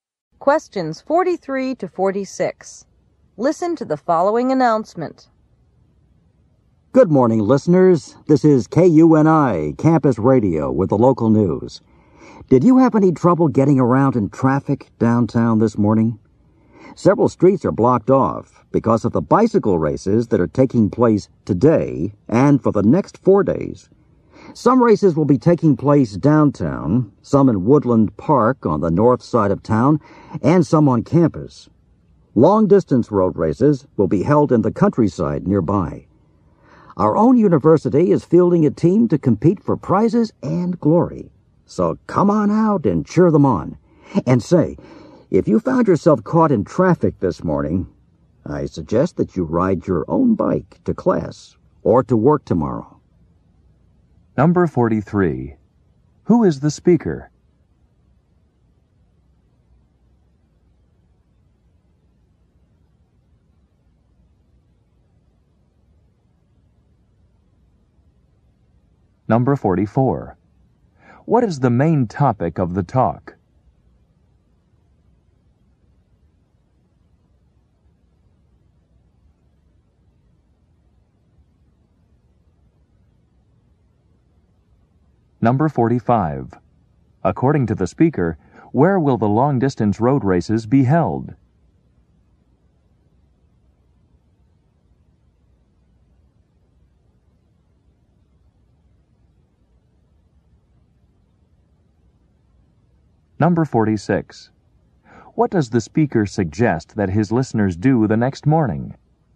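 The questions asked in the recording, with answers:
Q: Who is the speaker?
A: A campus radio announcer

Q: What is the main topic of the talk?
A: The bicycle races

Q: According to the speaker, where will the long-distance road races be held?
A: In the countryside nearby

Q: What does the speaker suggest that his listeners do the next morning?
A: Ride their bikes to class or work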